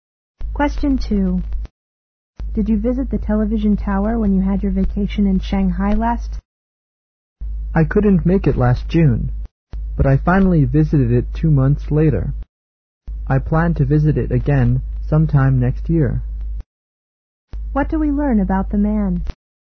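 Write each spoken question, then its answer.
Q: What do we learn about the man?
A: He visited the TV tower two months after June and plans to visit it again next year.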